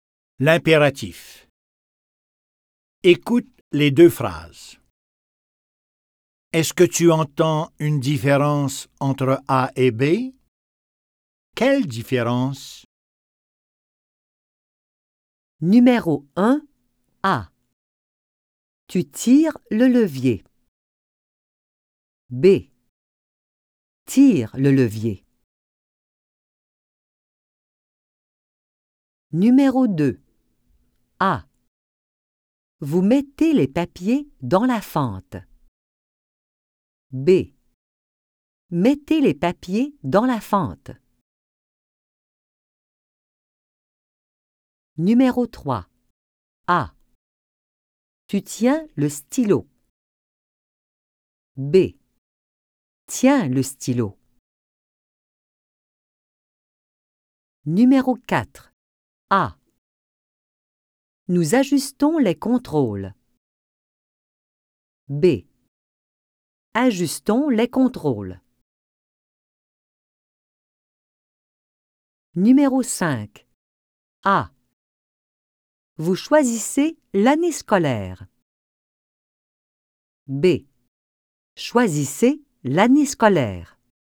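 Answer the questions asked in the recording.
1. B est à l'impératif (sans sujet), A est au présent
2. B est à l'impératif (sans sujet), A est au présent
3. B est à l'impératif (sans sujet), A est au présent
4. B est à l'impératif (sans sujet), A est au présent
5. B est à l'impératif (sans sujet), A est au présent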